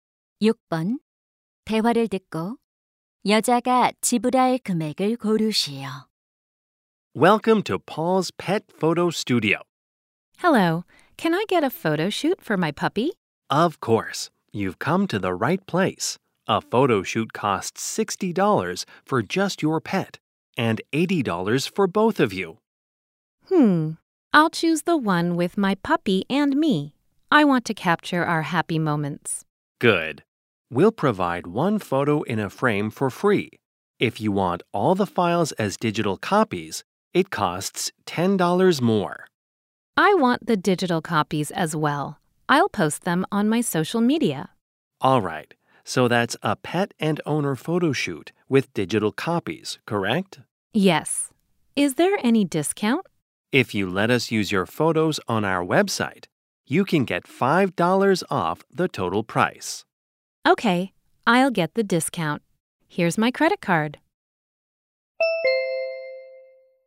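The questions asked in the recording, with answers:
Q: 대화를 듣고 여자가 지불할 금액을 고르시오.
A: 85달러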